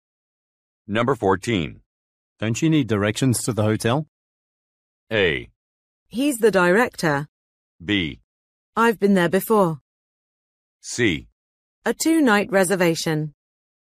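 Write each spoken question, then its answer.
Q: Don't you need directions to the hotel?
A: B: I've been there before.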